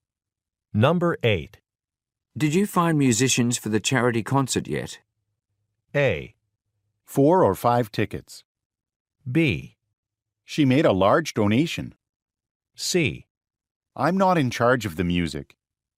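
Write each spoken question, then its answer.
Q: Did you find musicians for the charity concert yet?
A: C: I'm not in charge of the music.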